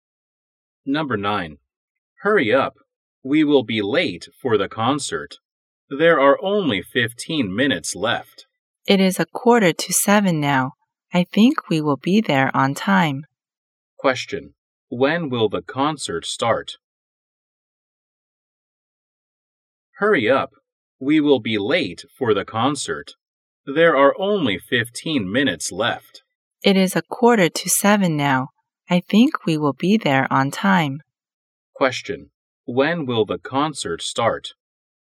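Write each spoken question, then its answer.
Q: Question: When will the concert start?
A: At 7:00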